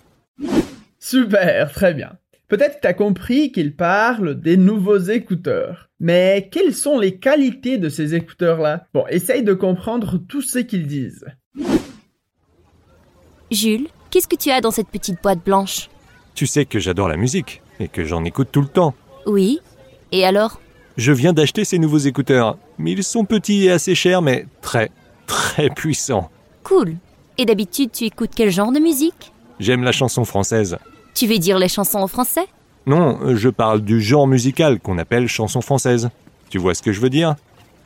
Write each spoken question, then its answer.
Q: Mais quelles sont les qualités de ces écouteurs-là?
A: qui sont petits, assez chers, mais très très puissants